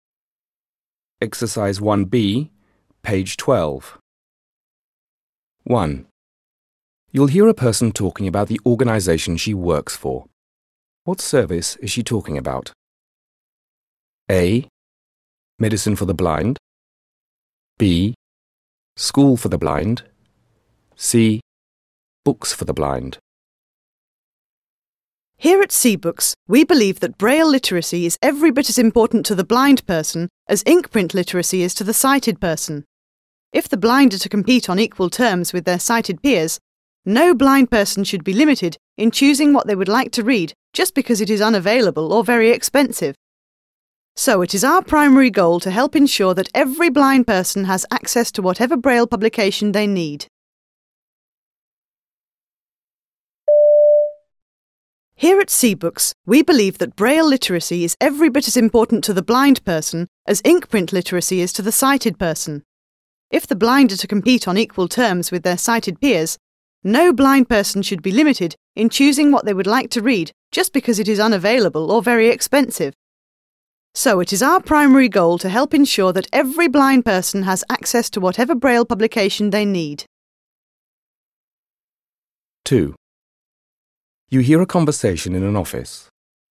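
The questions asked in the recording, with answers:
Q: What service is she talking about?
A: C: Books for the blind.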